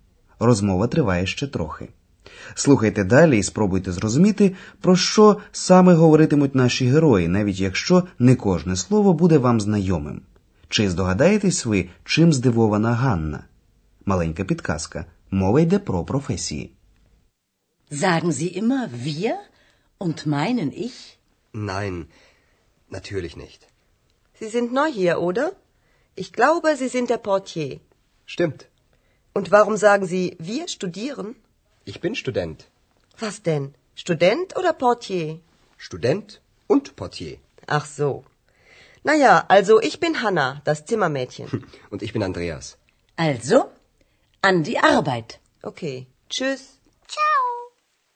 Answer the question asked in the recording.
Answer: Ганна здивована тим, що Андреас називає себе студентом, хоча трохи раніше він говорив, що працює в готелі Портьє.